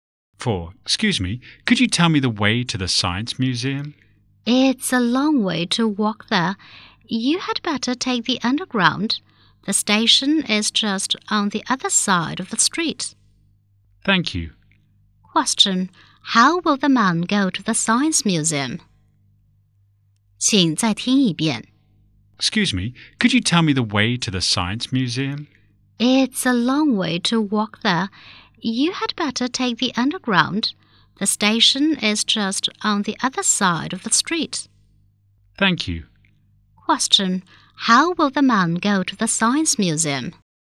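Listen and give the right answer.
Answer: By underground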